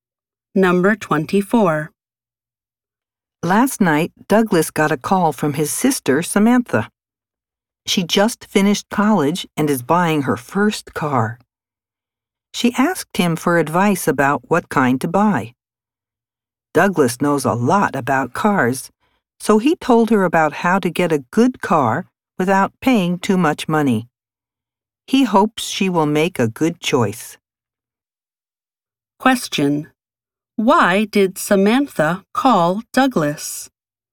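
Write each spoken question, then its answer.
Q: Why did Samantha call Douglas?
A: To ask him for advice about what kind of car to buy.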